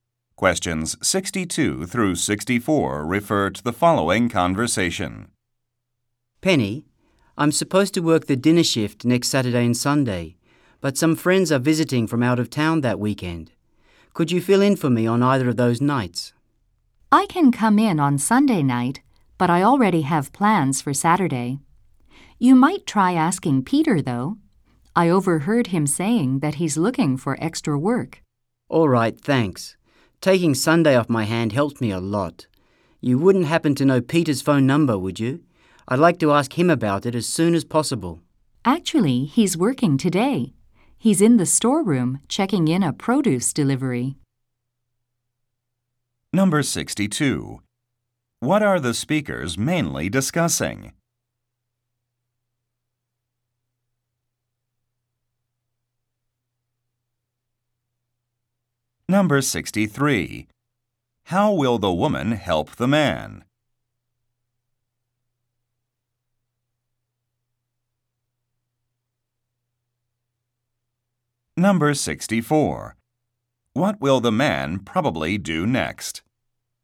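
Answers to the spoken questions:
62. Covering a work shift
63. By working Sunday night for him
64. Go to the storeroom to talk to Peter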